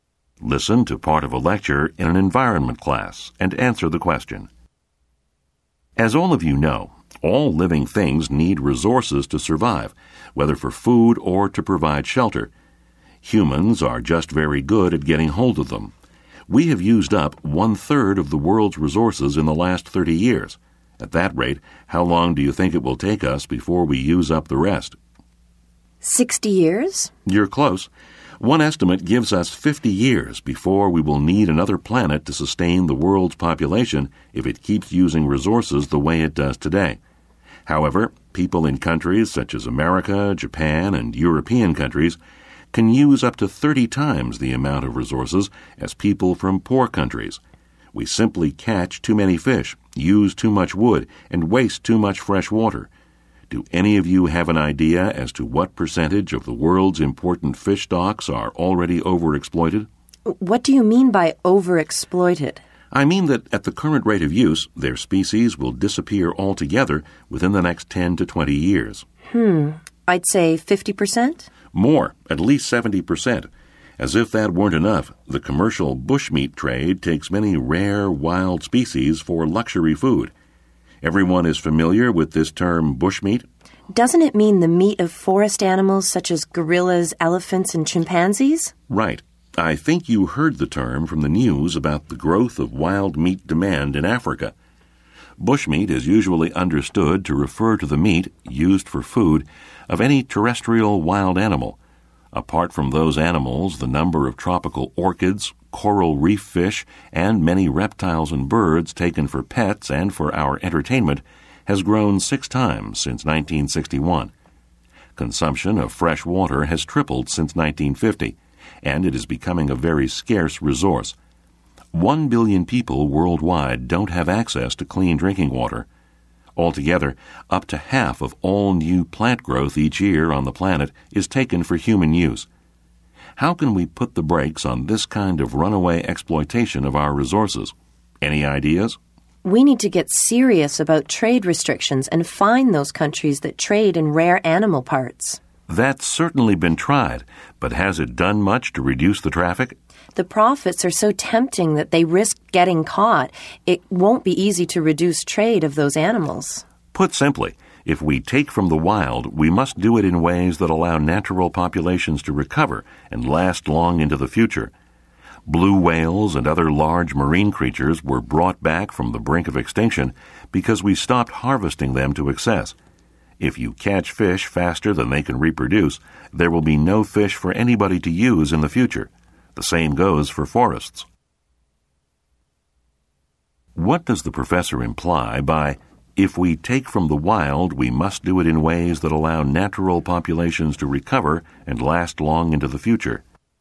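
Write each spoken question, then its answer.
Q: What does the professor imply by, if we take from the wild, we must do it in ways that allow natural populations to recover and last long into the future?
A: We should use wild resources sustainably and not take them faster than they can reproduce and recover.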